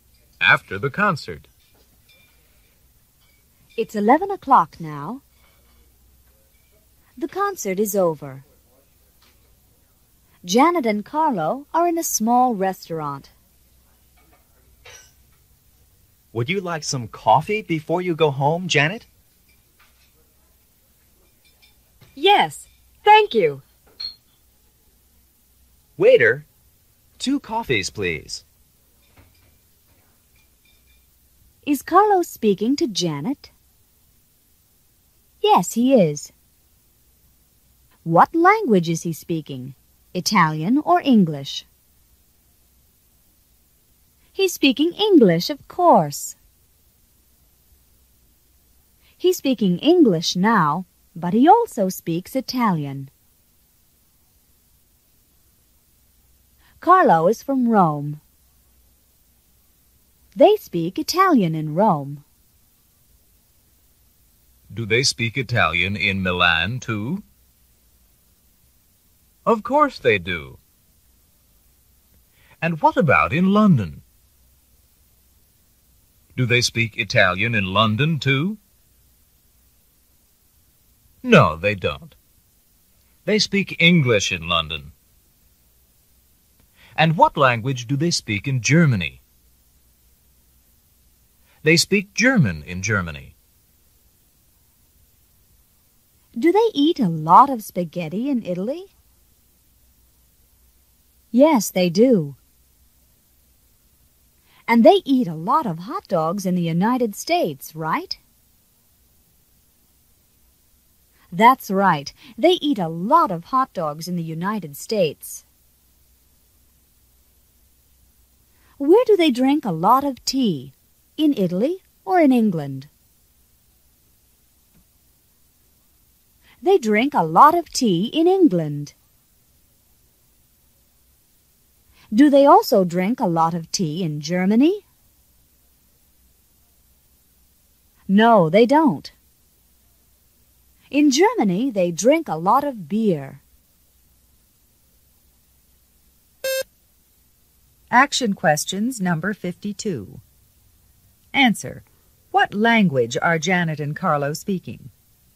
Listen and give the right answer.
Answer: They're speaking English.